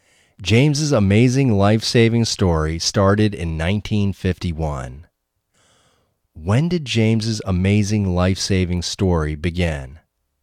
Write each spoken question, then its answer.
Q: When did James's amazing life-saving story begin?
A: James's amazing life-saving story began in 1951.